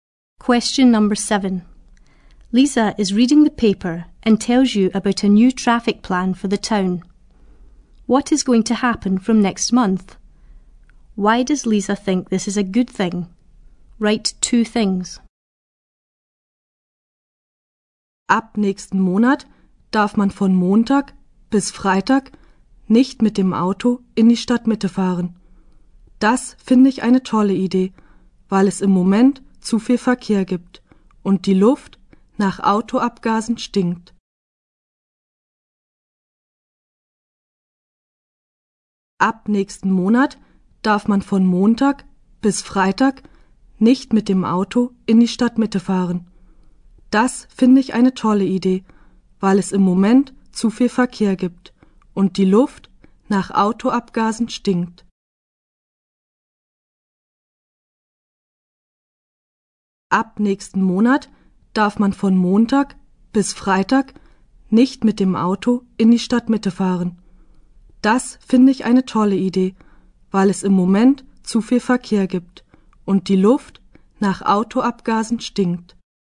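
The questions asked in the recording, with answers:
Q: What is going to happen from next month?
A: Cars won't be allowed in the town centre from Monday to Friday

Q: Why does Lisa think this is a good thing?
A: There is too much traffic at the moment and the air stinks of exhaust fumes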